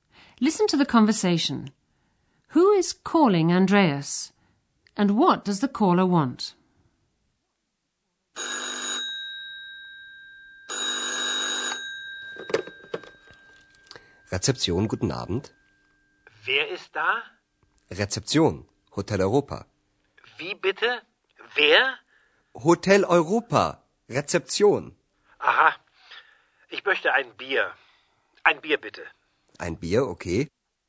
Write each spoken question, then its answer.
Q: And what does the caller want?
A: The caller asks Andreas for a beer.